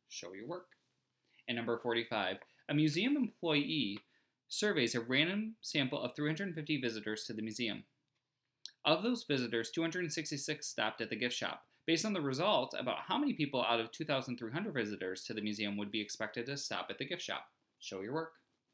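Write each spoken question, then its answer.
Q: Based on the results, about how many people out of 2,300 visitors to the museum would be expected to stop at the gift shop?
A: About 1,748 people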